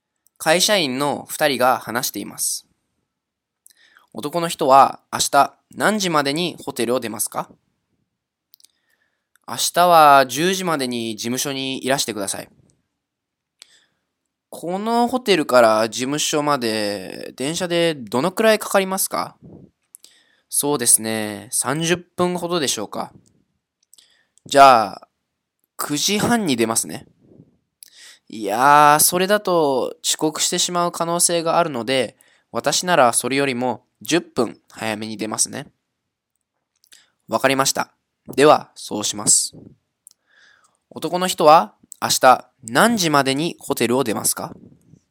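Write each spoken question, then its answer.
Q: 男の人は明日何時までにホテルを出ますか?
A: 9時20分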